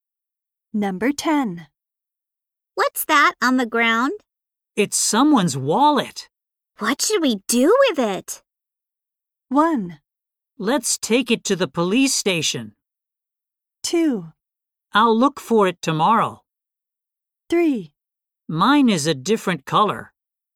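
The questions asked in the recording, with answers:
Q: What should we do with it?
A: 1: Let's take it to the police station.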